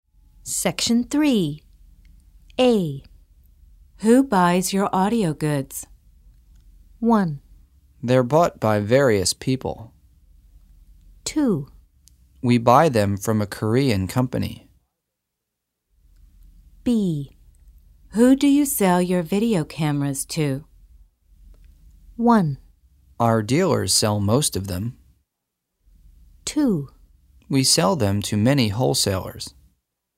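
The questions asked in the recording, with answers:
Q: Who buys your audio goods?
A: 1: They're bought by various people.

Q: Who do you sell your video cameras to?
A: 2: We sell them to many wholesalers.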